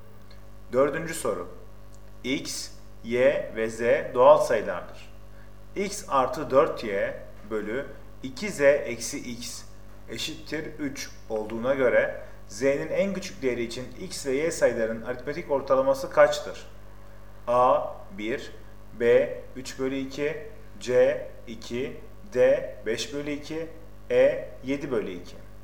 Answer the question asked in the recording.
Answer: Doğru cevap B 3 bölü 2.